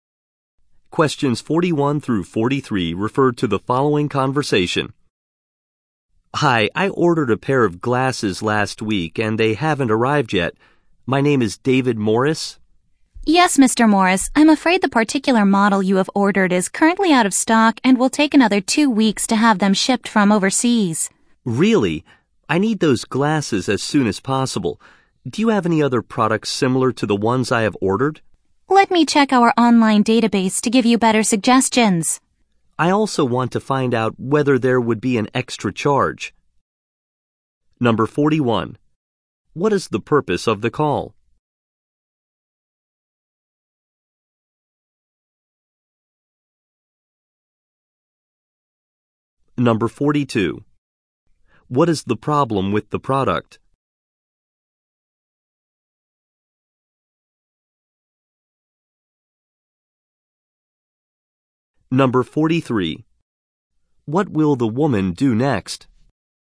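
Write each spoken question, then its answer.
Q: What is the purpose of the call?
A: To ask about glasses he ordered that haven't arrived

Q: What is the problem with the product?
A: It is out of stock

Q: What will the woman do next?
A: Check the online database for similar products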